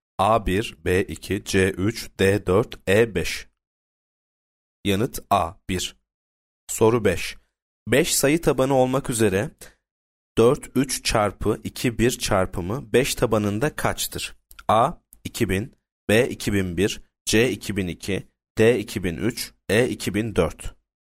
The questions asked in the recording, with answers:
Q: 5 sayı tabanı olmak üzere 4 3 çarpı 2 1 çarpımı 5 tabanında kaçtır?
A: Yanıt D 2003.